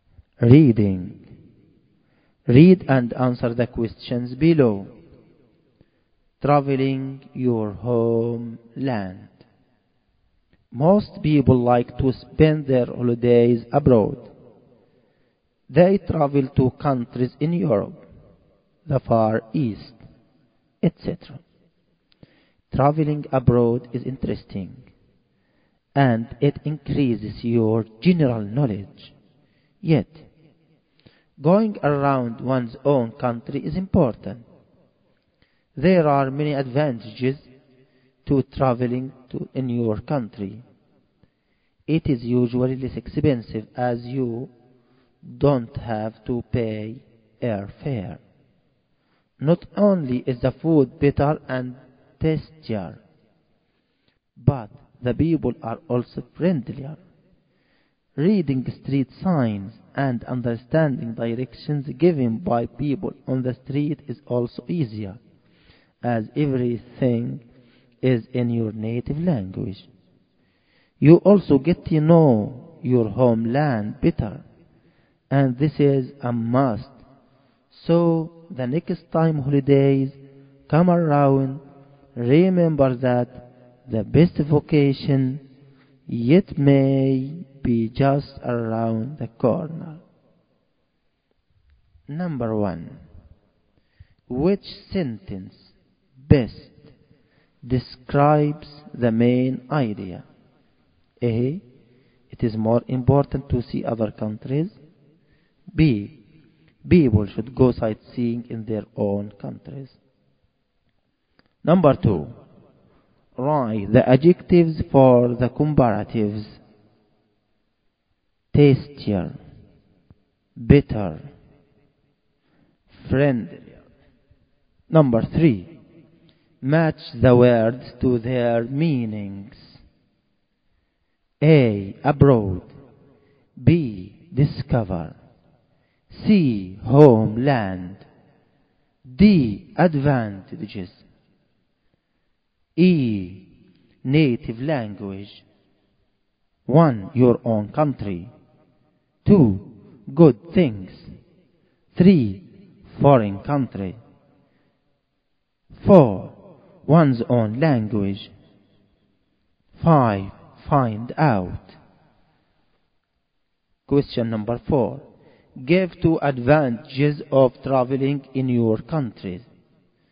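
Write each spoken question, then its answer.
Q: which sentence best describes the main idea?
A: B: People should go sightseeing in their own countries.

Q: Give 2 advantages of traveling in your country.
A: It is less expensive, and the food is better and the people friendlier.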